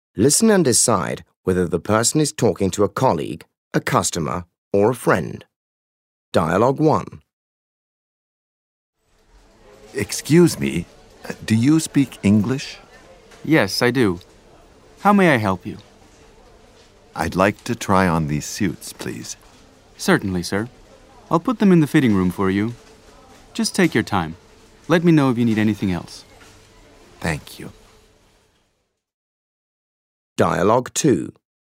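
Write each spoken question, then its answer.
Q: Listen and decide whether the person is talking to a colleague, a customer, or a friend.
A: a customer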